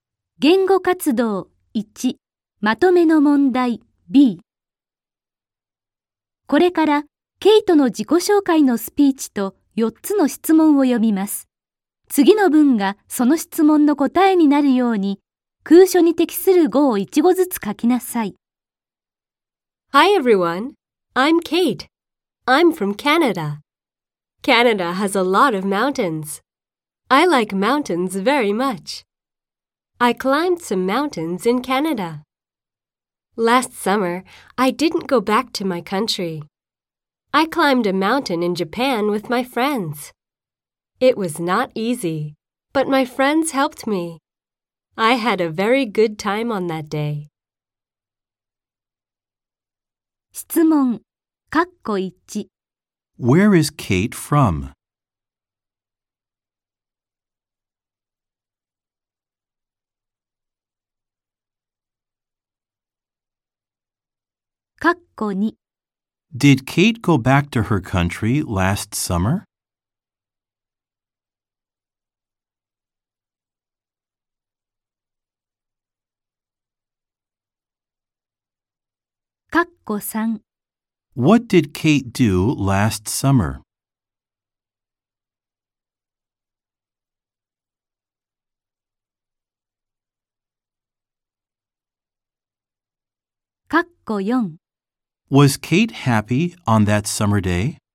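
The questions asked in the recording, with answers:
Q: Where is Kate from?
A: She is from Canada.

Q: Did Kate go back to her country last summer?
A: No, she didn't.

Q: What did Kate do last summer?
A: She climbed a mountain in Japan with her friends.

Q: Was Kate happy on that summer day?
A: Yes, she was.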